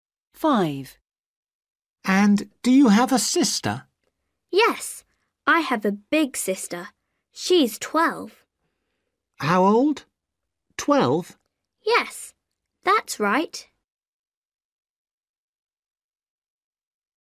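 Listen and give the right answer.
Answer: Yes, she's 12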